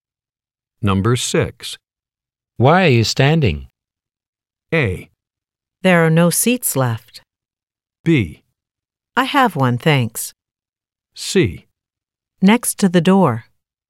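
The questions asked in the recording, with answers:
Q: Why are you standing?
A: A: There are no seats left.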